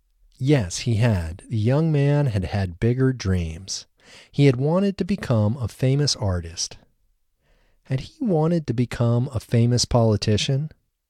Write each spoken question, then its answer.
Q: Had he wanted to become a famous politician?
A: No, he hadn't wanted to become a famous politician.